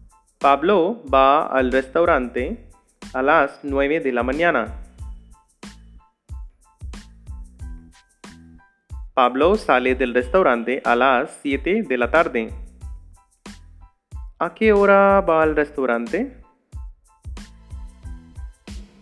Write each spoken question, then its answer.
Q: ¿A qué hora va al restaurante?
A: Pablo va al restaurante a las nueve de la mañana.